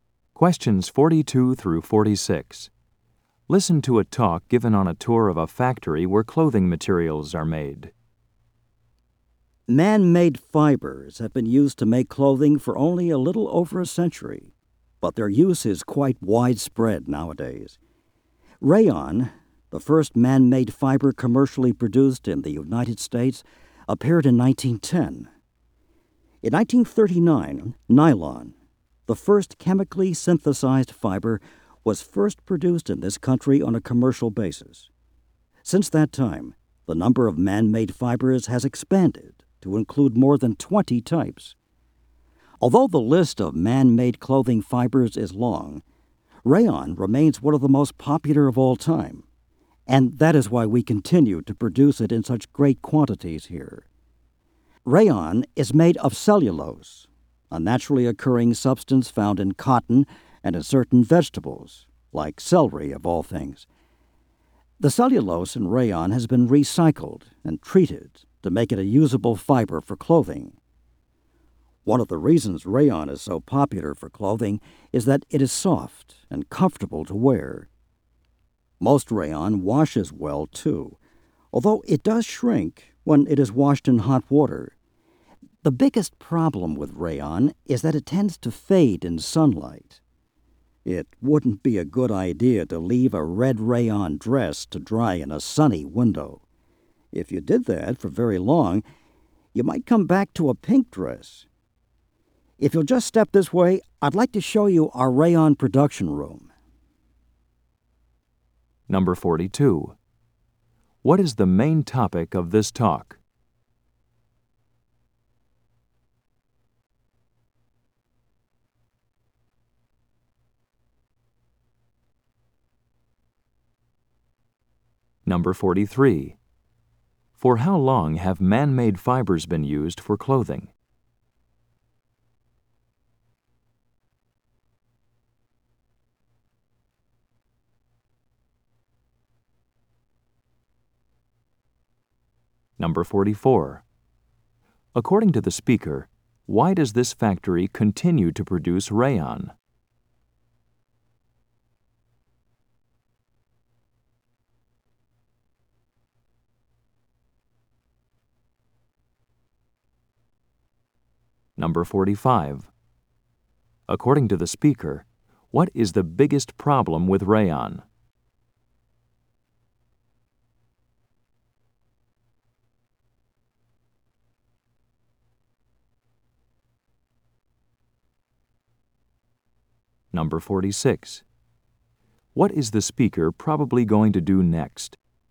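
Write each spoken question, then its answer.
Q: What is the main topic of this talk?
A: Rayon, a man-made fiber

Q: For how long have man-made fibers been used for clothing?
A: A little over a century

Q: According to the speaker, why does this factory continue to produce rayon?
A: It remains one of the most popular fibers

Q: What is the biggest problem with rayon?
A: It fades in sunlight

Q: What is the speaker probably going to do next?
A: Show the rayon production room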